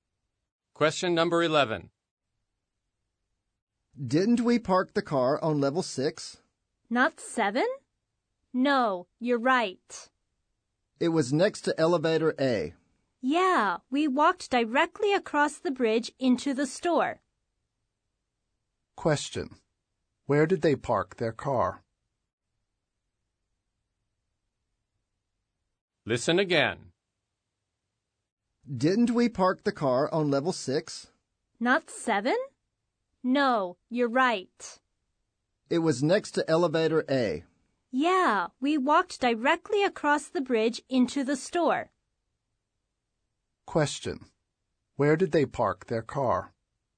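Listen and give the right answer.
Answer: On level 6, next to elevator A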